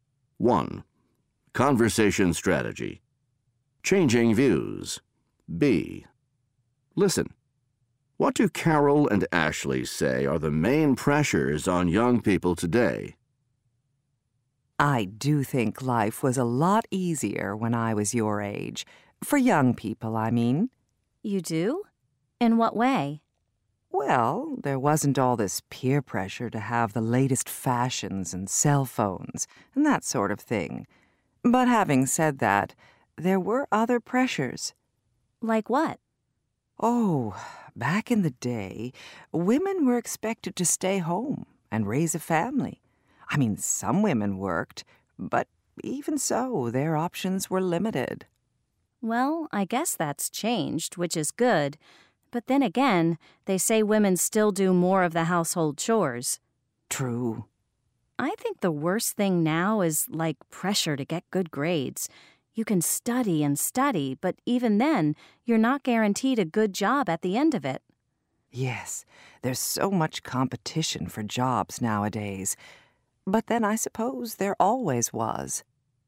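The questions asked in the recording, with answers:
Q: What do Carol and Ashley say are the main pressures on young people today?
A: Peer pressure to have the latest fashions and cell phones, and pressure to get good grades amid competition for jobs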